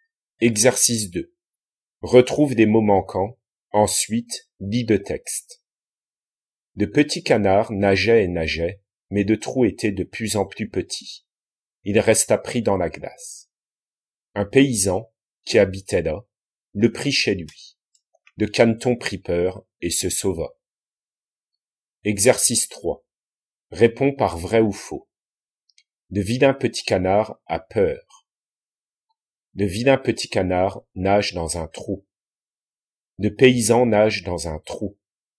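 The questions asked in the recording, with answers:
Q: Le vilain petit canard a peur.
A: vrai

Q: Le vilain petit canard nage dans un trou.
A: vrai

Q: Le paysan nage dans un trou.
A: faux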